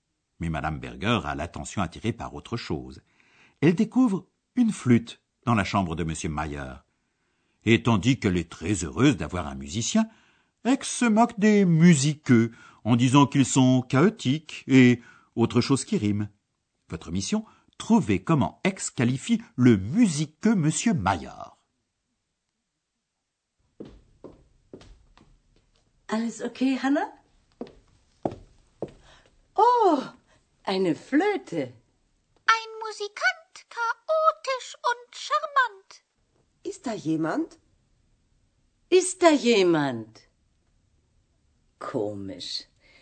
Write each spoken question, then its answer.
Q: trouvez comment Aix qualifie le musiqueux monsieur Maillard.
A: Ex le qualifie de chaotique et charmant, charmante.